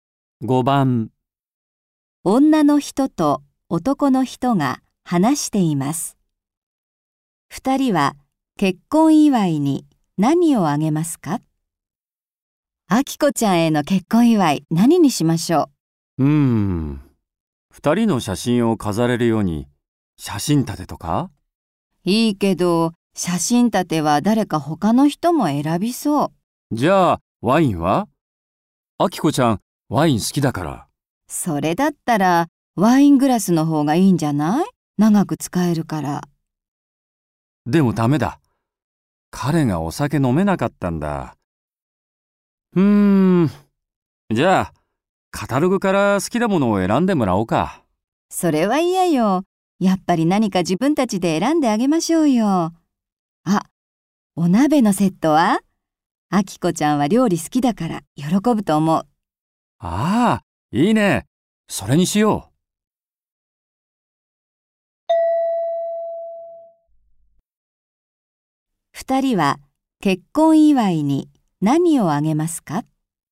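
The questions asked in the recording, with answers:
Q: 二人は結婚祝いに何をあげますか?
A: お鍋のセット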